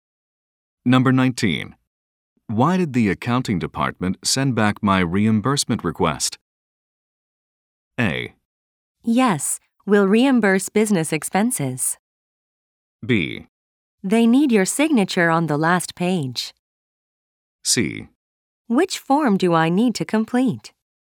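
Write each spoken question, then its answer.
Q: Why did the accounting department send back my reimbursement request?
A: B: They need your signature on the last page.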